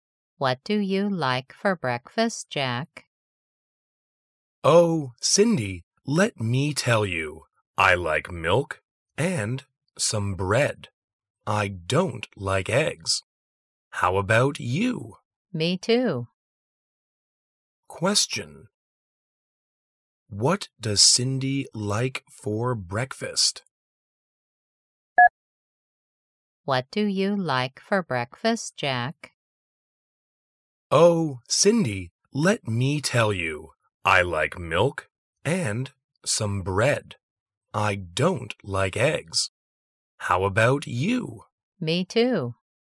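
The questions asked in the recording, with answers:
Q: What does Cindy like for breakfast?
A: Milk and bread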